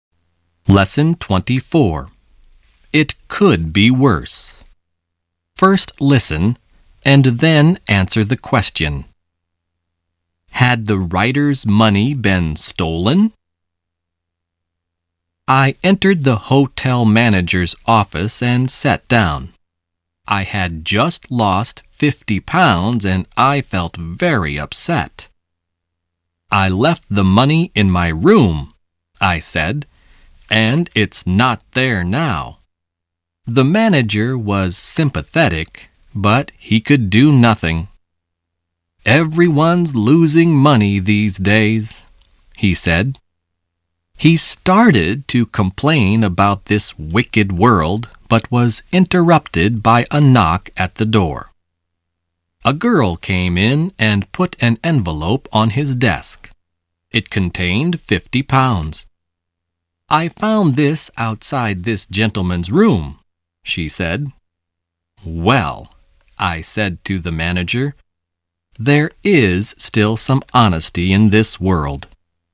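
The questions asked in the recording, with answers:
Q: Had the writer's money been stolen?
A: No, it hadn't. A girl found it outside his room.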